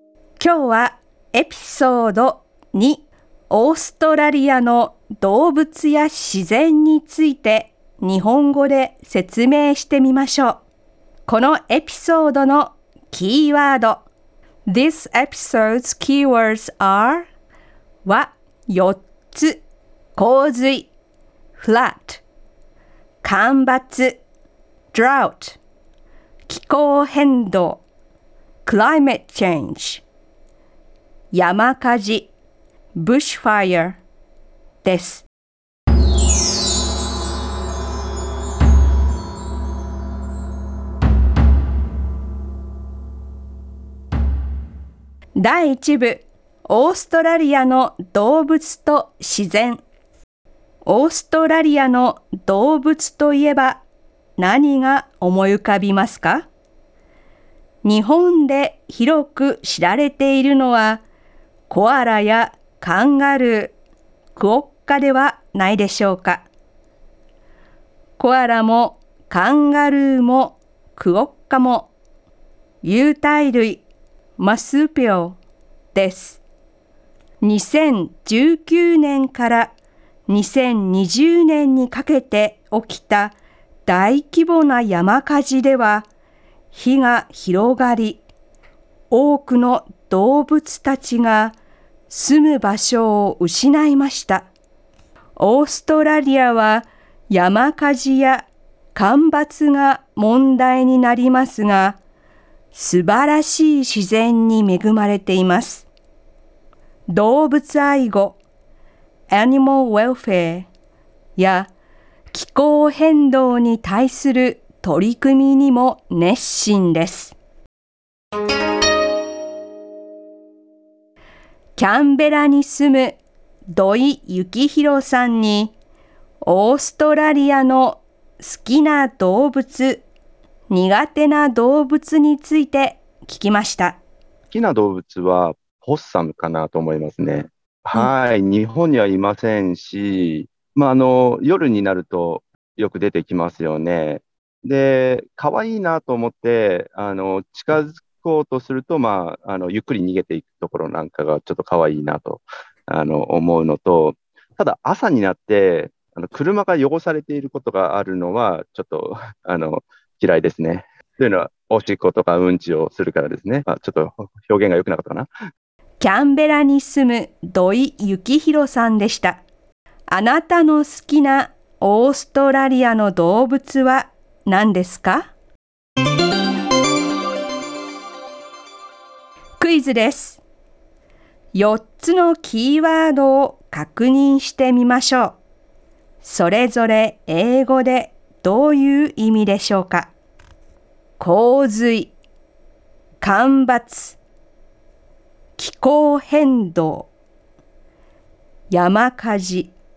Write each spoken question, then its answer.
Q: 気候変動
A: 気候変動は climate change